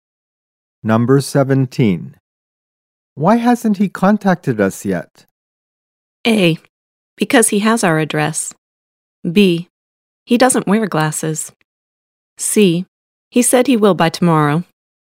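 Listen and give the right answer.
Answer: C: He said he will by tomorrow.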